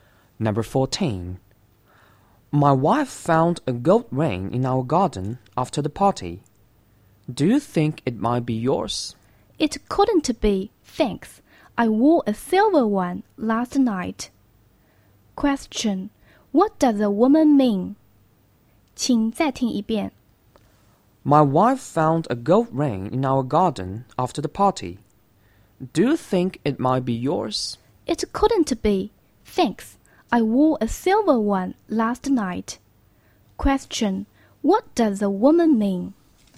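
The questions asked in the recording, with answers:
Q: Question. What does the woman mean?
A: The gold ring isn't hers; she wore a silver one.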